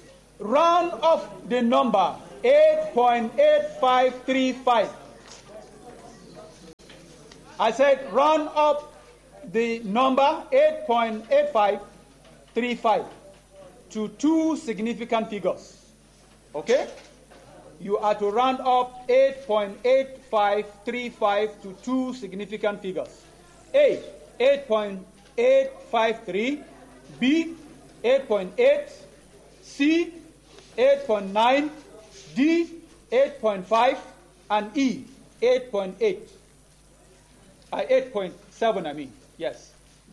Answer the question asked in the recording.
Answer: 8.9, yes.